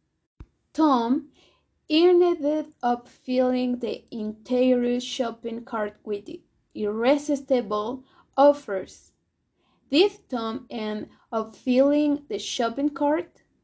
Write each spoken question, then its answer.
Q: Did Tom end up filling the shopping cart?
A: Yes, Tom ended up filling the shopping cart.